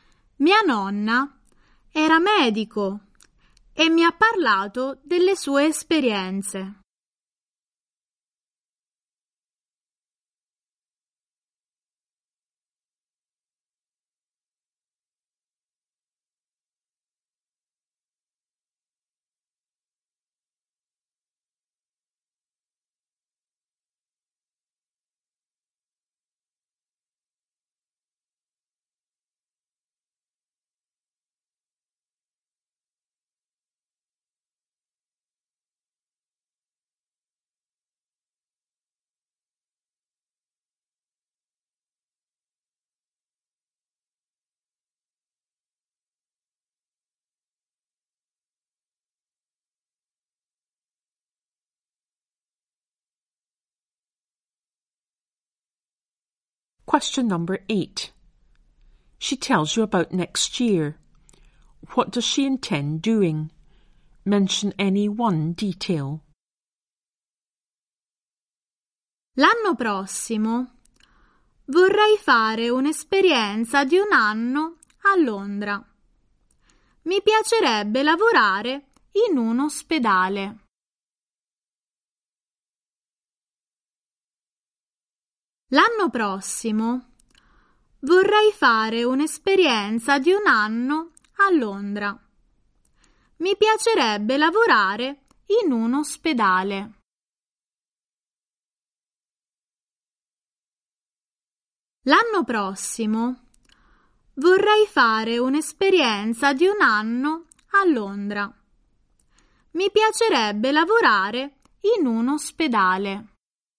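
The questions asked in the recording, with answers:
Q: What does she intend doing?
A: Spend a year in London; work in a hospital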